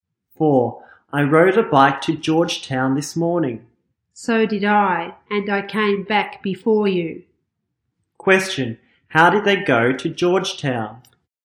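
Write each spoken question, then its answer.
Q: How did they go to Georgetown?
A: By bike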